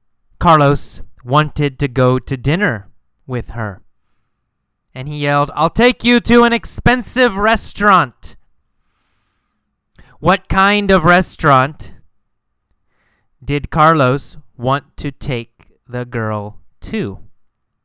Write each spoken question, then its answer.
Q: What kind of restaurant did Carlos want to take the girl to?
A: What kind? An expensive restaurant, right?